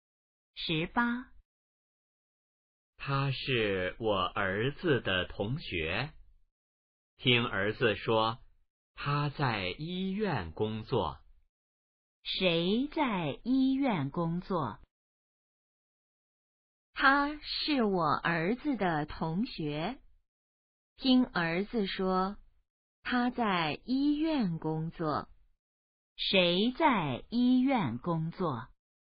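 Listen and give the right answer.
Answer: 儿子的同学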